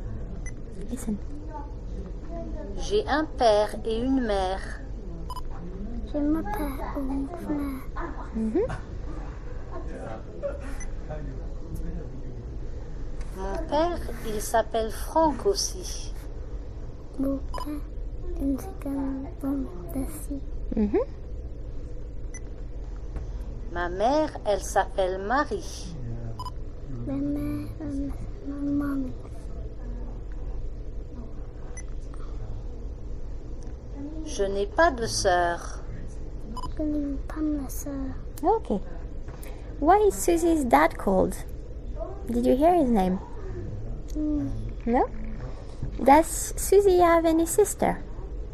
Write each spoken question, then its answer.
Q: Does Susie have any sister?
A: No.